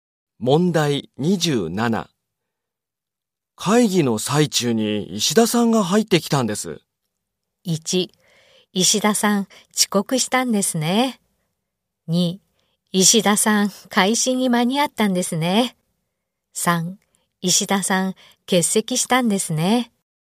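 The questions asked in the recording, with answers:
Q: 会議の最中に石田さんが入ってきたんです。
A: 2: 石田さん、遅刻したんですね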